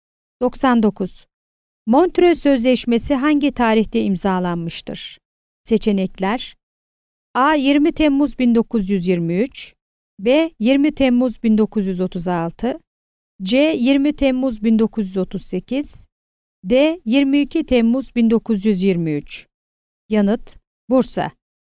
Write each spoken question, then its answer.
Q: Montrö Sözleşmesi hangi tarihte imzalanmıştır?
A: Yanıt: Bursa.